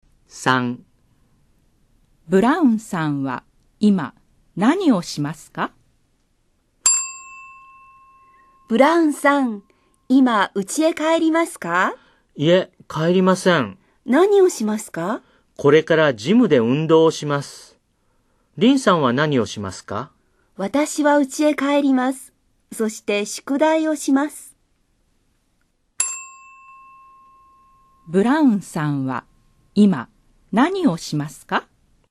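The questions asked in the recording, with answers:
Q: ブラウンさんは今何をしますか?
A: ジムで運動をします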